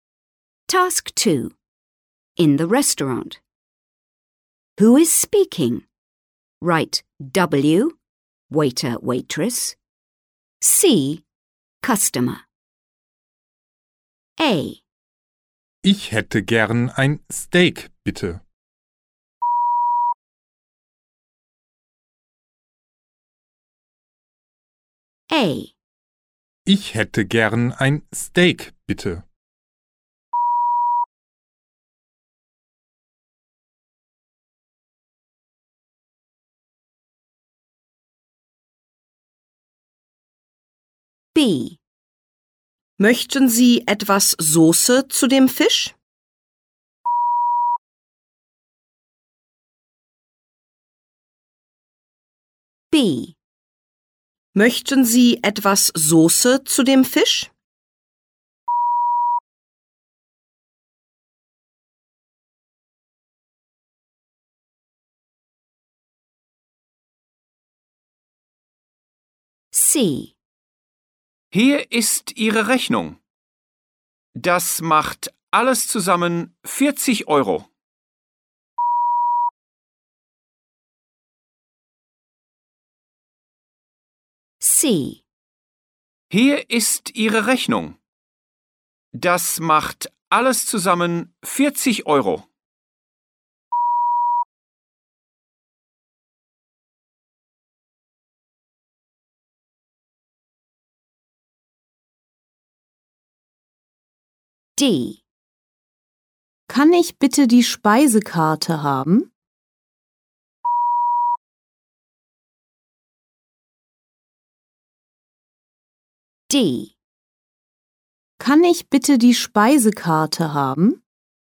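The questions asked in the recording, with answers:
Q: Who is speaking? Write W, waiter, waitress.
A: C: customer

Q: Who is speaking? Write W, waiter, waitress.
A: W: waiter/waitress

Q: Who is speaking? Write W, waiter, waitress.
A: W: waiter/waitress

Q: Who is speaking? Write W, waiter, waitress.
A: C: customer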